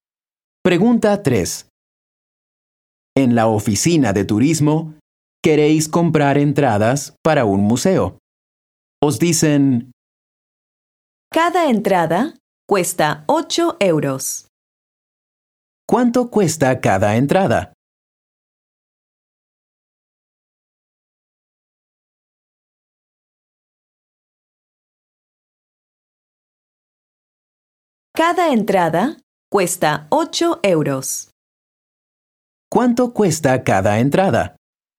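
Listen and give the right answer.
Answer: 8 euros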